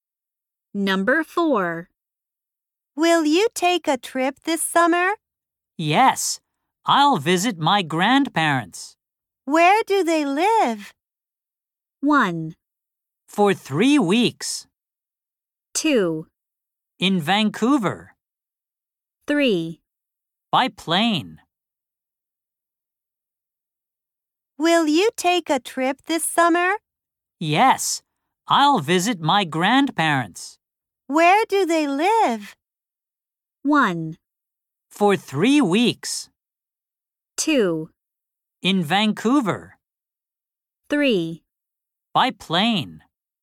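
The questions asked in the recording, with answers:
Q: Where do they live?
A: 2: In Vancouver.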